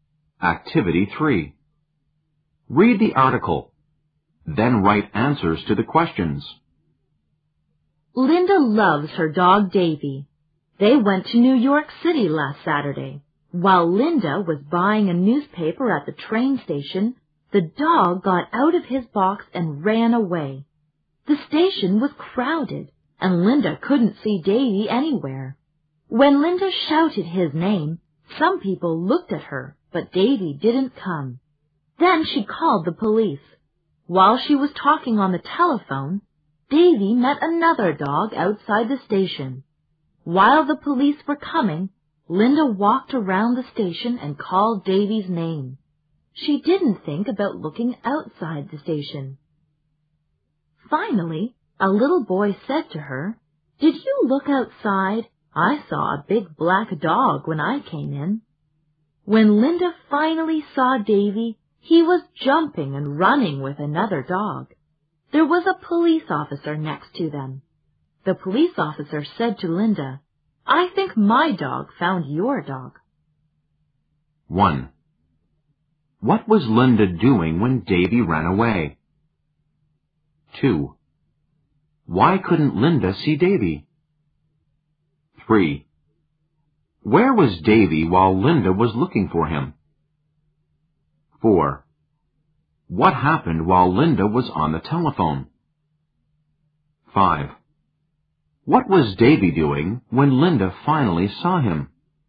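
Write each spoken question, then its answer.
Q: What was Linda doing when Davy ran away?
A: She was buying a newspaper at the train station.

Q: Why couldn't Linda see Davy?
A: The station was crowded.

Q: Where was Davy while Linda was looking for him?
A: Outside the station.

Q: What happened while Linda was on the telephone?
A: Davy met another dog outside the station.

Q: What was Davy doing when Linda finally saw him?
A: He was jumping and running with another dog.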